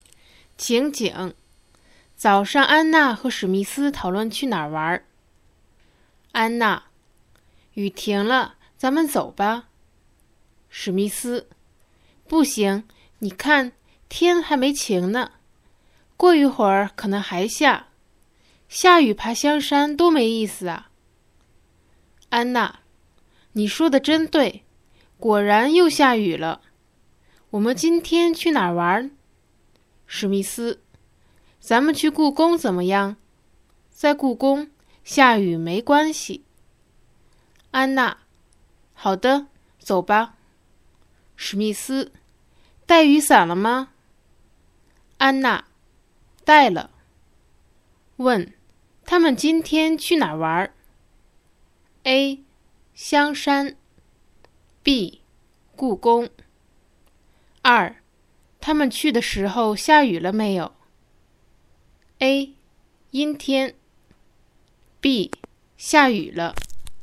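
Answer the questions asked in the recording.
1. B: 故宫
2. B: 下雨了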